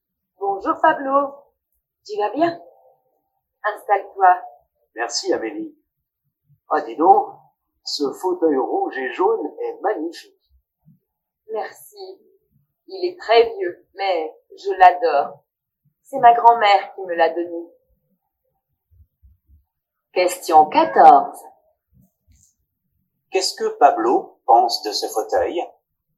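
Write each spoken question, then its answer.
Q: Qu'est-ce que Pablo pense de ce fauteuil ?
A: Il le trouve magnifique.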